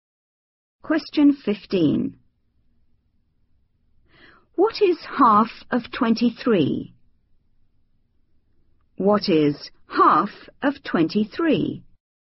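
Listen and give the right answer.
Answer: 11.5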